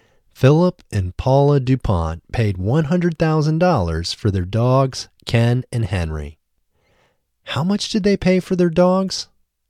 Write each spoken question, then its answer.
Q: How much did they pay for their dogs?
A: They paid $100,000 for their dogs.